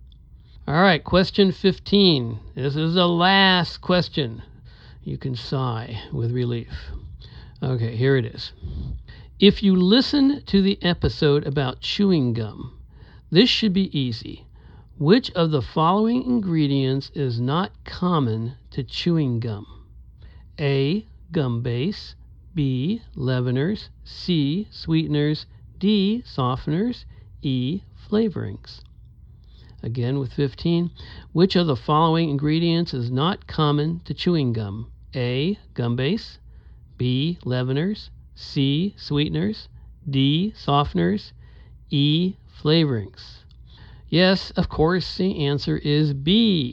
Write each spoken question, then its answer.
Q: Which of the following ingredients is not common to chewing gum?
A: Yes, of course, the answer is B. Leaveners